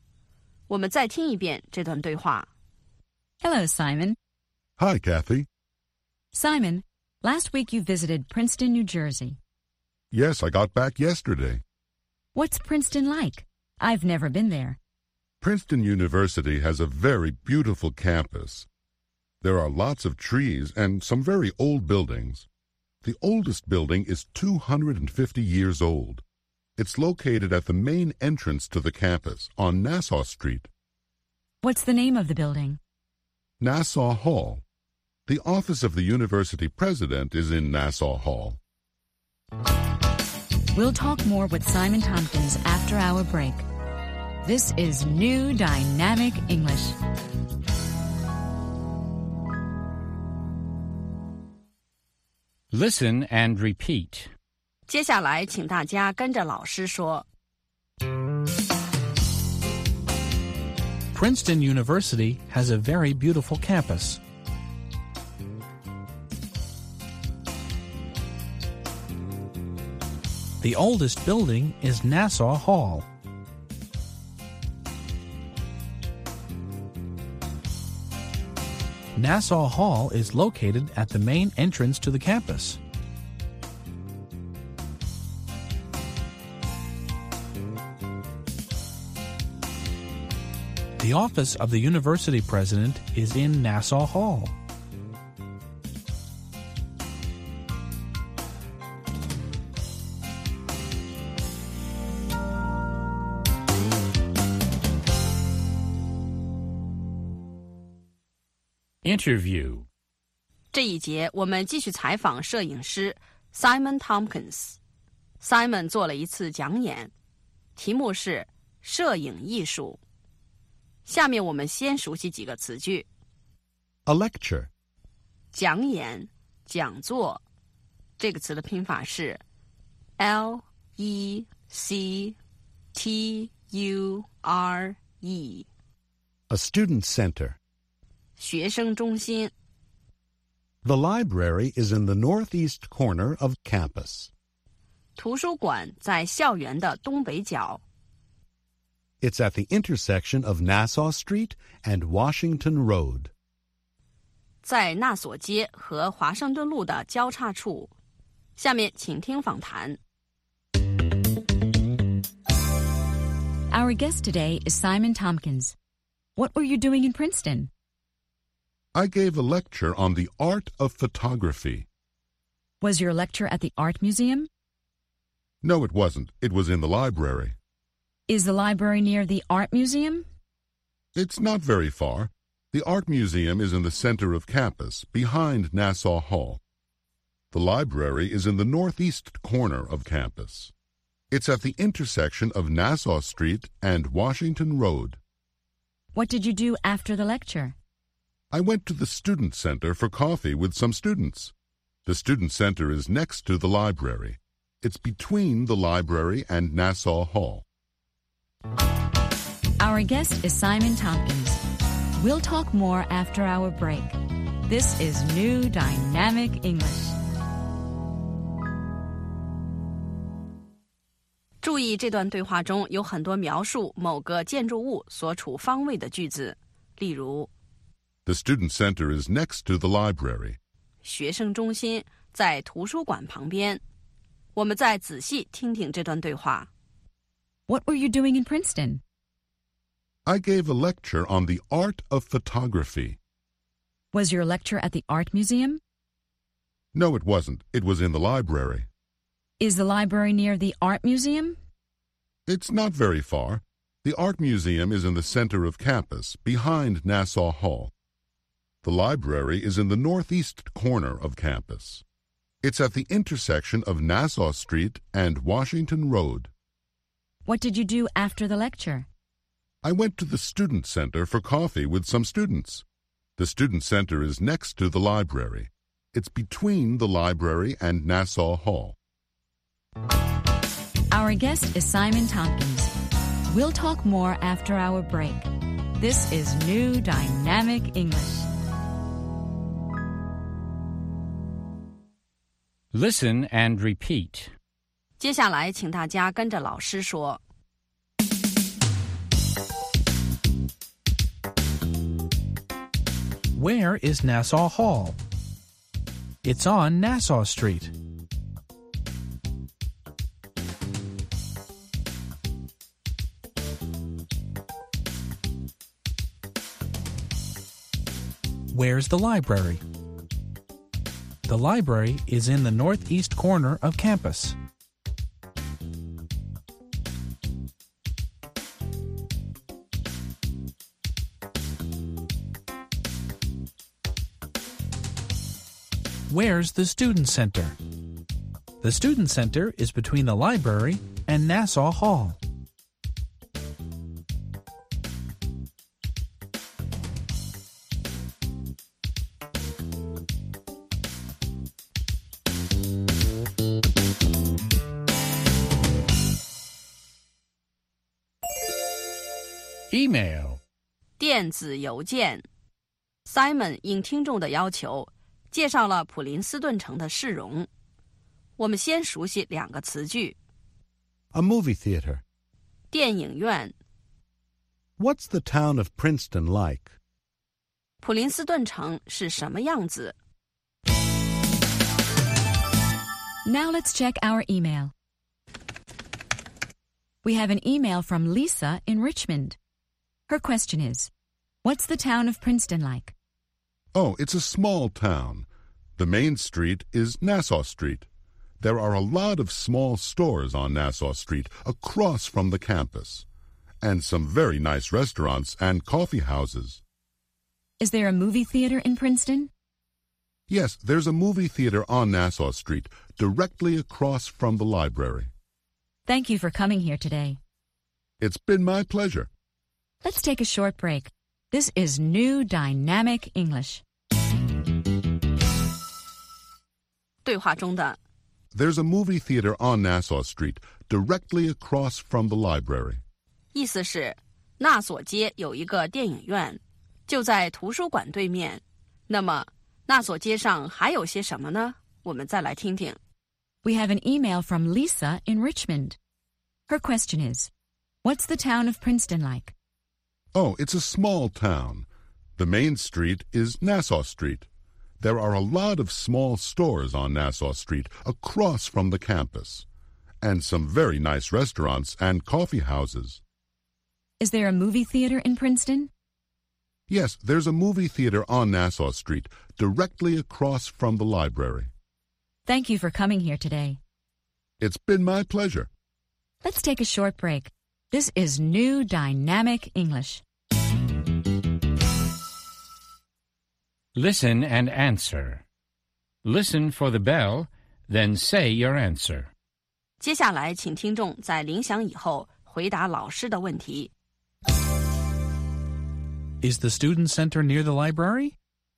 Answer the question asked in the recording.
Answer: Yes, it is. It's next to the library.